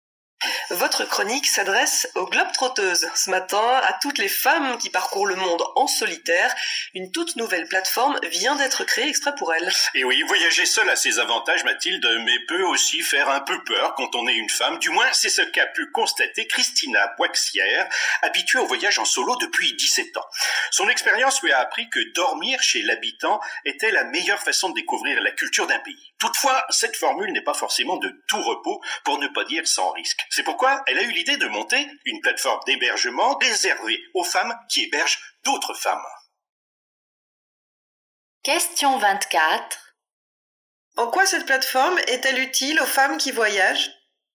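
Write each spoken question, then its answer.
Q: En quoi cette plateforme est-elle utile aux femmes qui voyagent ?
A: Elle leur permet de loger chez des femmes qui hébergent d'autres femmes, donc de voyager plus en sécurité.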